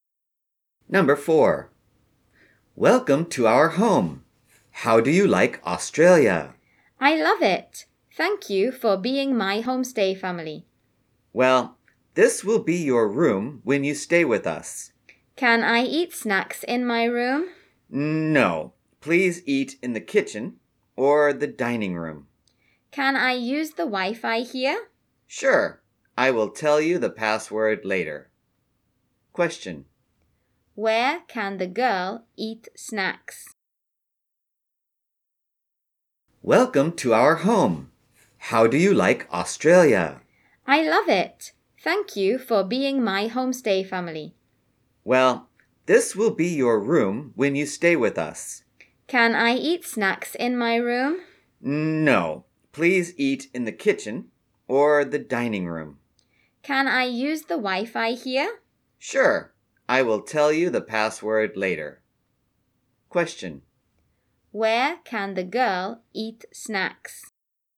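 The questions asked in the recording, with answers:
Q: Where can the girl eat snacks?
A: In the kitchen or the dining room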